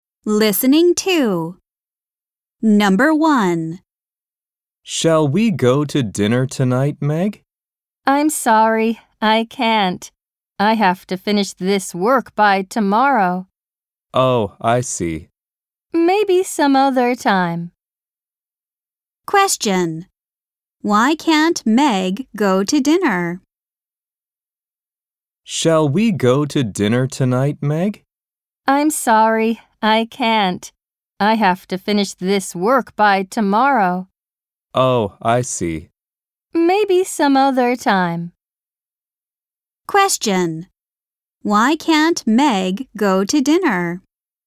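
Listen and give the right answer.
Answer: She has to finish her work by tomorrow.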